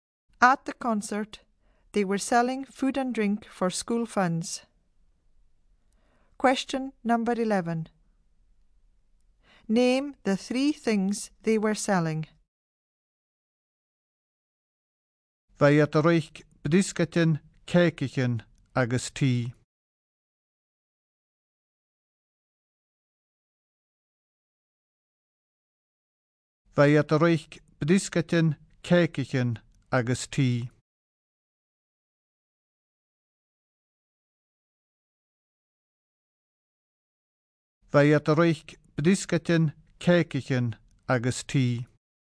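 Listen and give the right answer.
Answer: biscuits, cakes and tea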